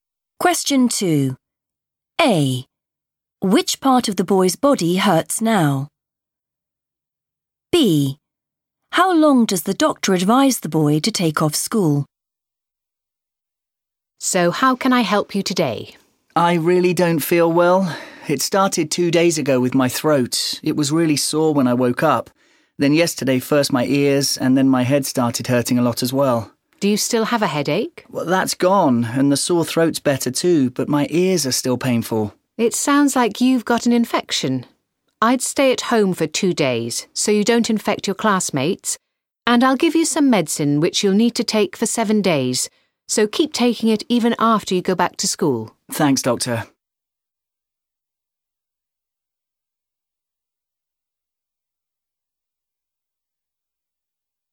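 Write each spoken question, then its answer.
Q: Which part of the boy's body hurts now?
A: his ears

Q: How long does the doctor advise the boy to take off school?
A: 2 days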